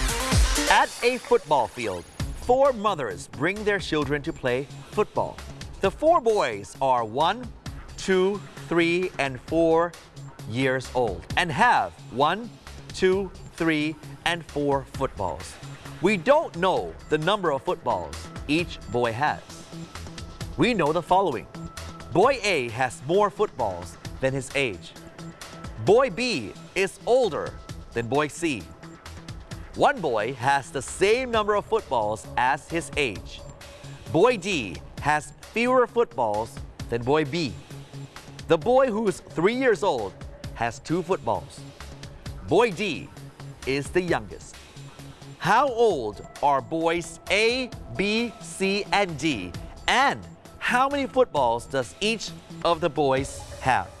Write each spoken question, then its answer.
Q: How old are boys A, B, C, and D? And how many footballs does each of the boys have?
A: A is a 2 years old boy and has 4 footballs.